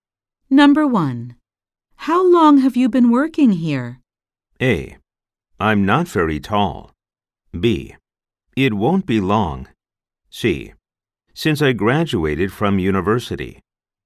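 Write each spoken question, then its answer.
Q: How long have you been working here?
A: C: Since I graduated from university.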